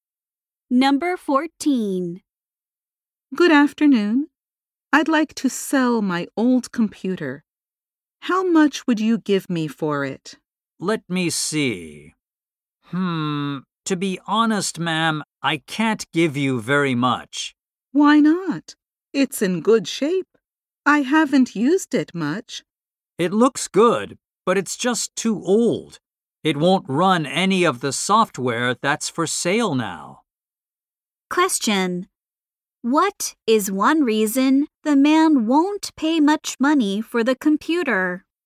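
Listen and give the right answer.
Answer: It is too old to run current software.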